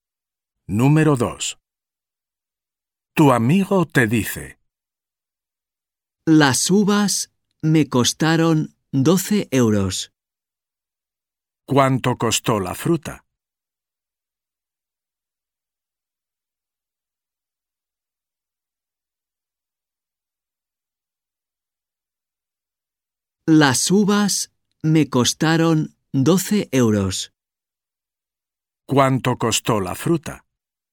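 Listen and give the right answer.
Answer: 12 euros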